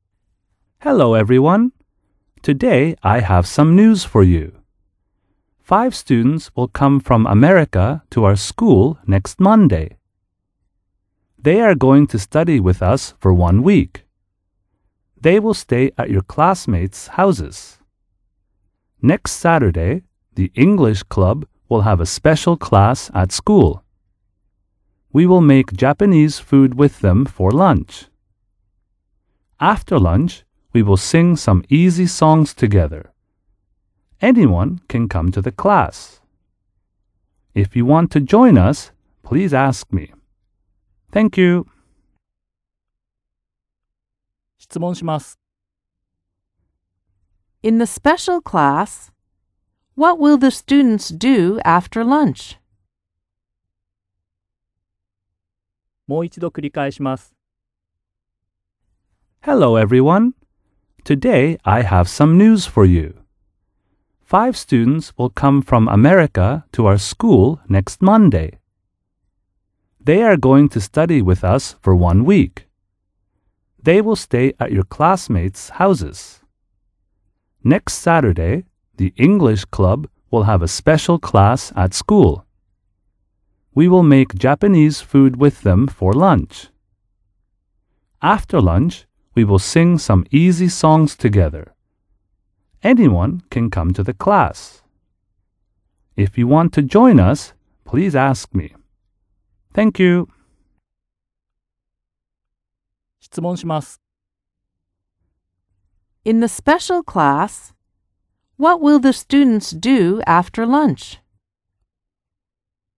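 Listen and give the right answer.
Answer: They will sing some easy songs together.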